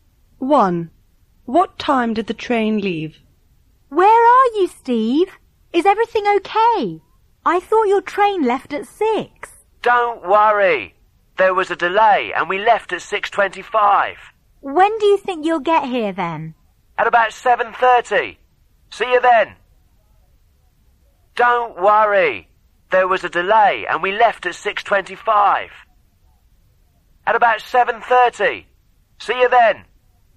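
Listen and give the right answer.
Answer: 6:25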